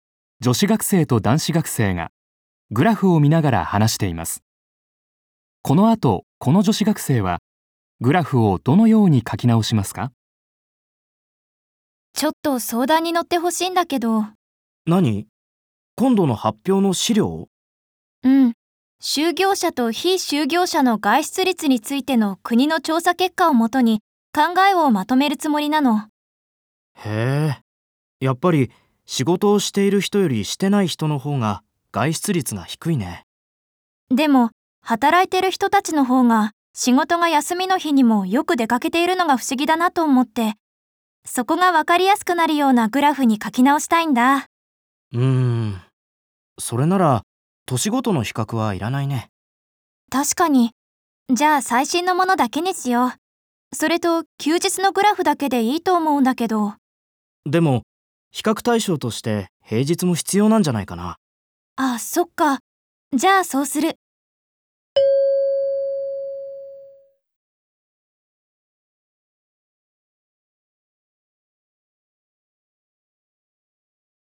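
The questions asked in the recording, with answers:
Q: この後、この女子学生はグラフをどのように書き直しますか?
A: 年ごとの比較をやめて最新のデータだけにし、休日と平日の両方のグラフを残す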